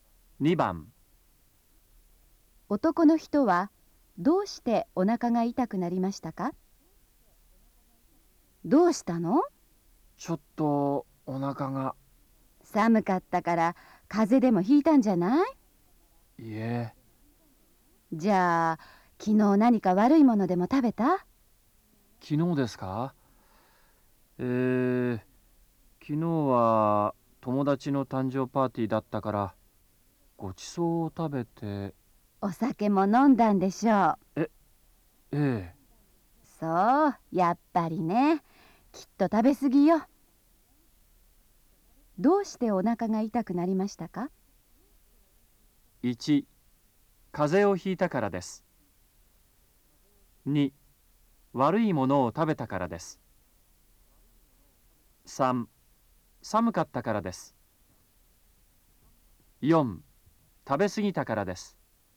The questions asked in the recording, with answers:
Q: どうしてお腹が痛くなりましたか?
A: 2番、4